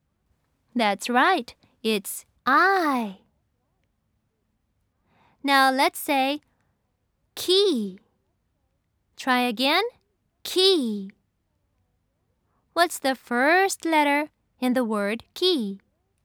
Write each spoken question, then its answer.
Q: What's the first letter in the word key?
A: Yes, it's K.